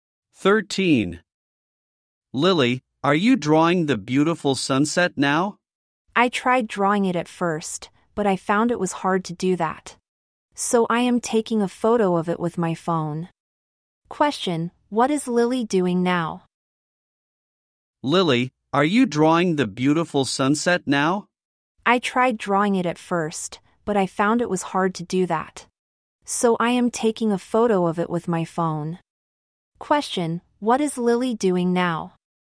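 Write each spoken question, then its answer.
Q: Question, what is Lily doing now?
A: Taking a photo of the sunset with her phone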